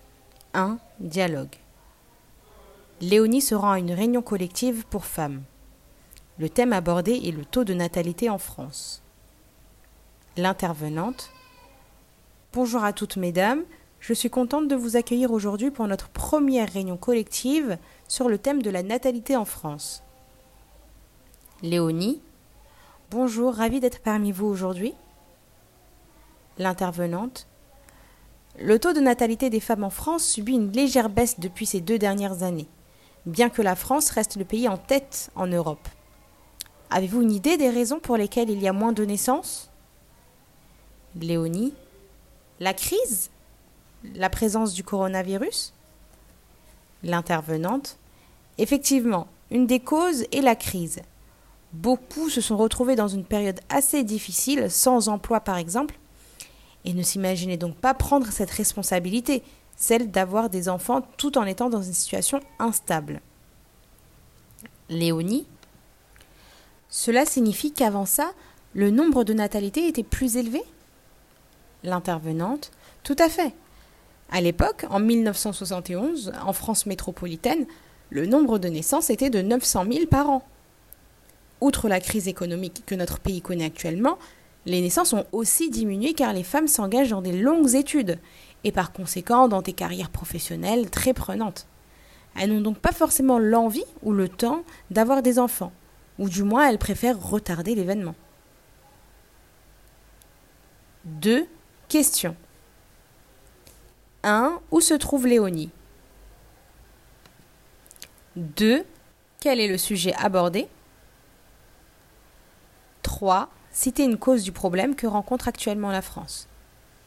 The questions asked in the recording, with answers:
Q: Où se trouve Léonie?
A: Dans une réunion collective pour femmes.

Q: Quel est le sujet abordé?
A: Le taux de natalité en France.

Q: Citer une cause du problème que rencontre actuellement la France.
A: La crise est une cause de la baisse des natalités en France.